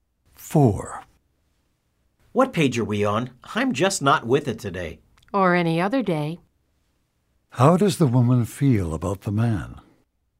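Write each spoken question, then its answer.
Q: How does the woman feel about the man?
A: She thinks he is always distracted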